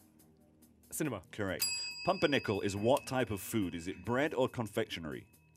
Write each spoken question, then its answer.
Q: Pumpernickel is what type of food?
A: Bread.